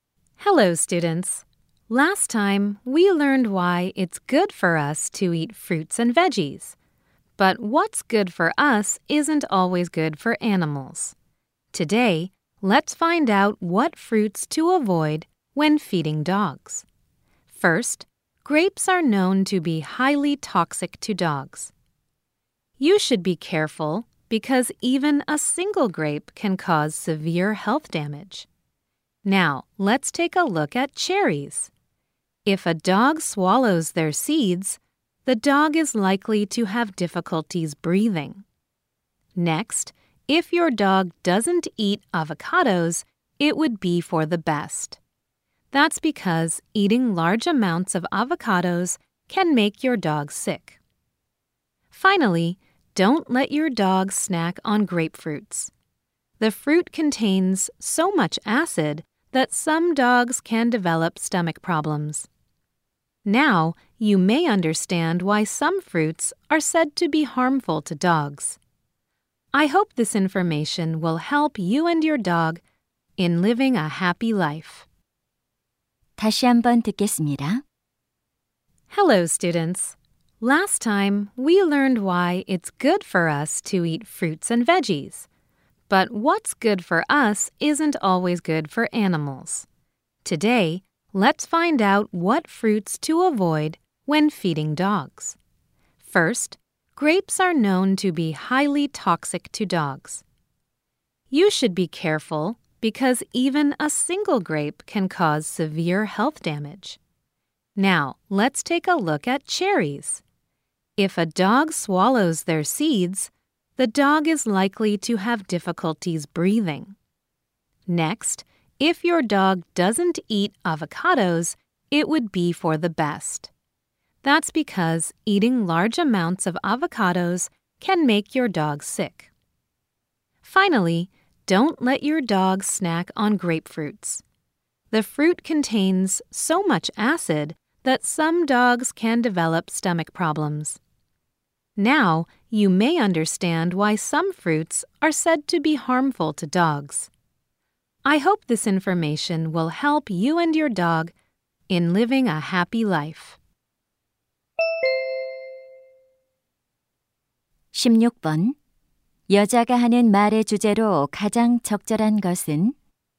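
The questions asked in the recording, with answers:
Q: 여자가 하는 말의 주제로 가장 적절한 것은?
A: 개에게 해로운 과일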